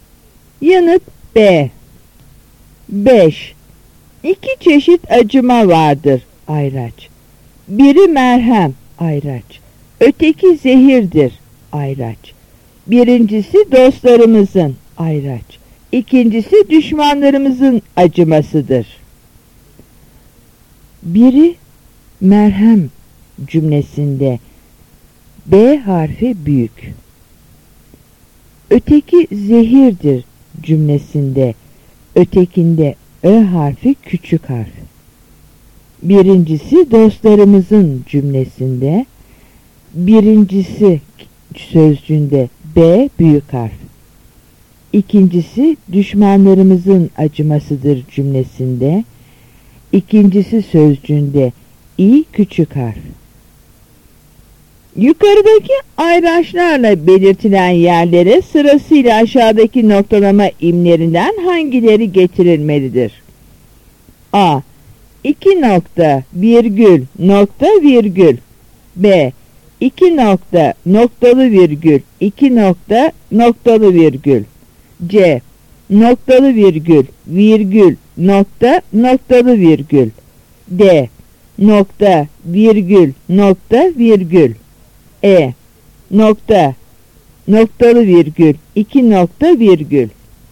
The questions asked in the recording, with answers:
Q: Yukarıdaki ayraçlarla belirtilen yerlere sırasıyla aşağıdaki noktalama imlerinden hangileri getirilmelidir?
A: Yanıt A.